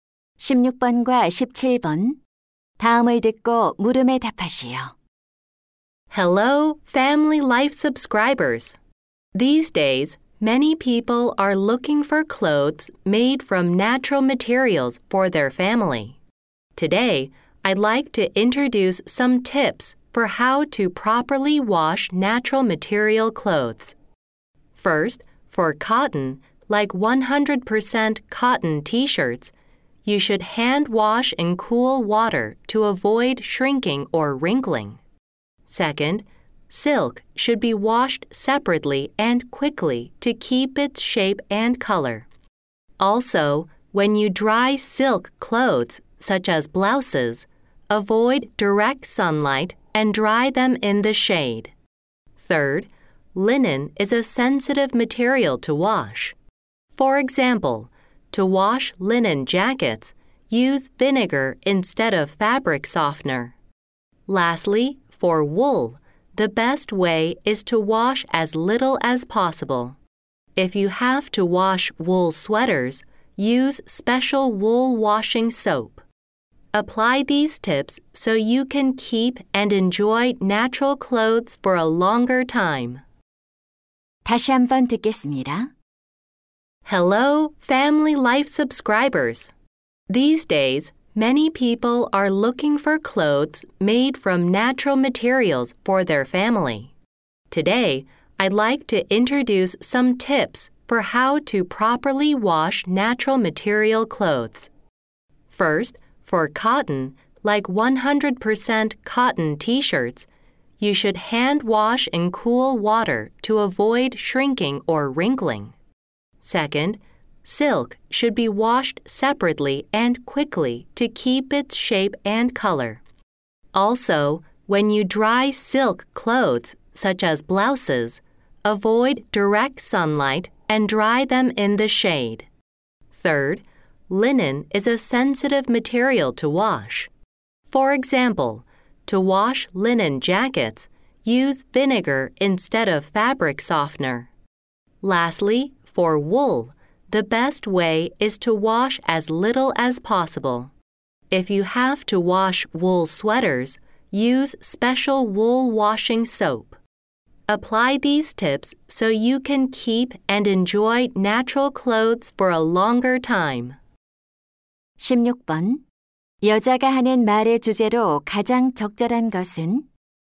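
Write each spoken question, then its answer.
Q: 여자가 하는 말의 주제로 가장 적절한 것은?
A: 천연 소재 옷을 올바르게 세탁하는 방법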